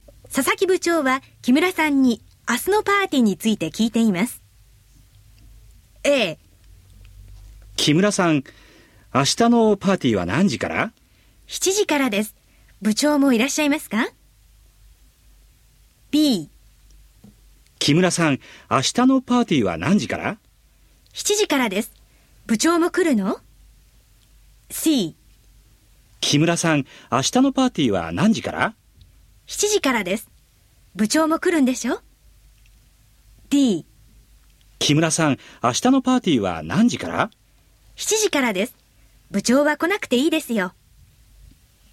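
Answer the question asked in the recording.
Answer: A: 7時からです。部長もいらっしゃいますか?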